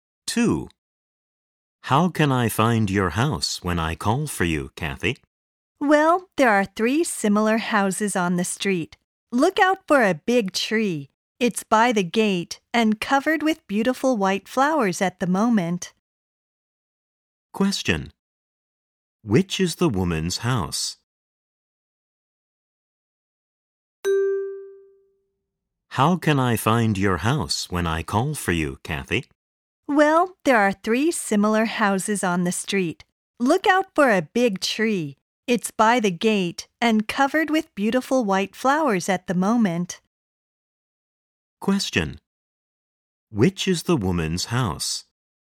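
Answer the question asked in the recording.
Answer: The house with a big tree covered in white flowers by the gate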